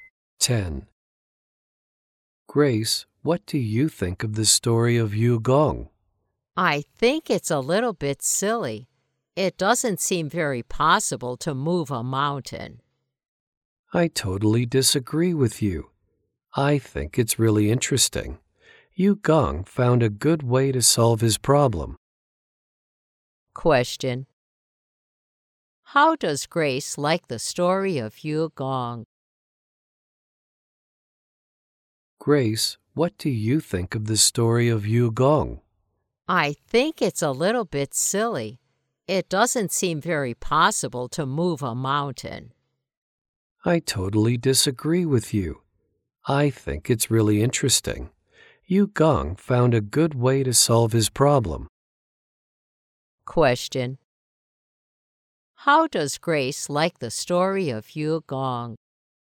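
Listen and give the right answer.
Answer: She thinks it's a little bit silly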